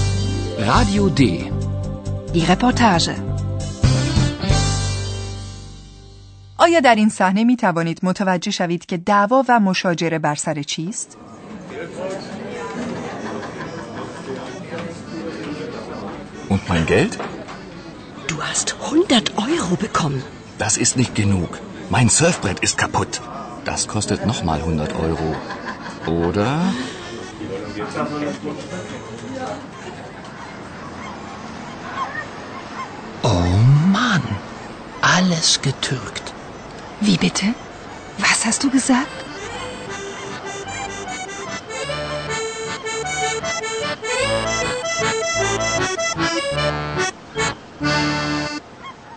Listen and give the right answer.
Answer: بله، دعوا بر سر موجود عزیزی به نام پول است.